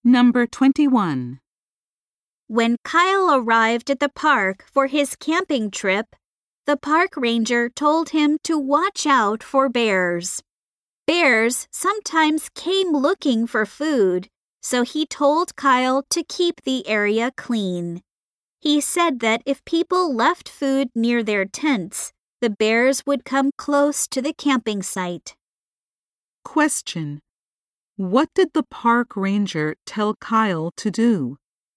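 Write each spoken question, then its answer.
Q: What did the park ranger tell Kyle to do?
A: Keep the camping area clean so bears don't come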